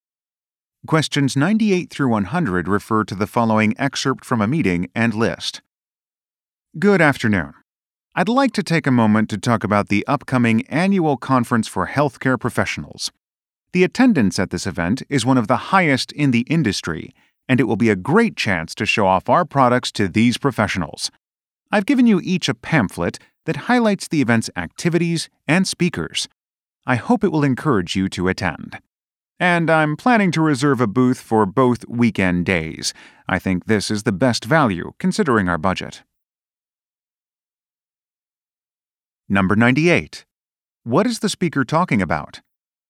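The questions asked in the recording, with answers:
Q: What is the speaker talking about?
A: An upcoming annual conference for healthcare professionals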